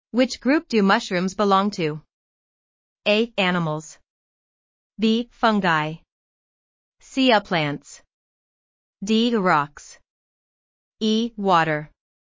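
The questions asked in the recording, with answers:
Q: Which group do mushrooms belong to?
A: B: Fungi.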